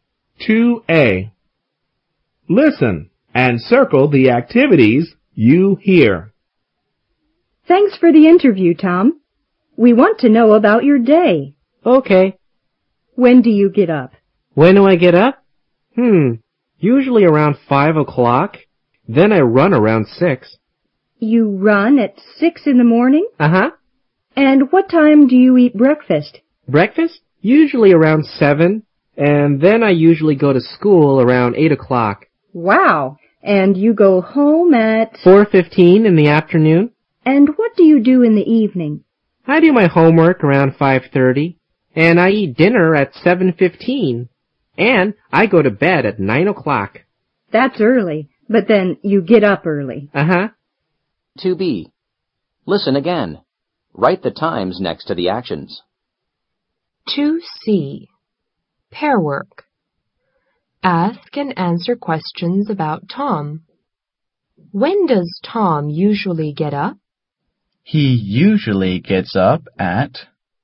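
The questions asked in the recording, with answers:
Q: When does Tom usually get up?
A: Around 5 o'clock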